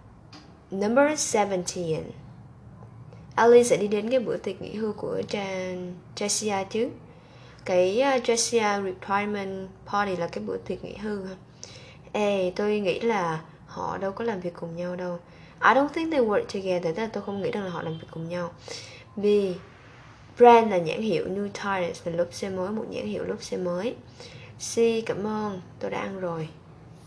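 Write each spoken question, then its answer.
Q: Alice sẽ đi đến cái bữa tiệc nghỉ hưu của Jessia chứ.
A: A: Tôi nghĩ là họ đâu có làm việc cùng nhau đâu.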